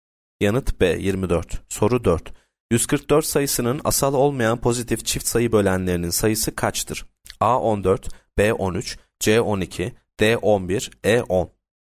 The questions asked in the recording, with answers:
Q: 144 sayısının asal olmayan pozitif çift sayı bölenlerinin sayısı kaçtır?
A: Yanıt D 11.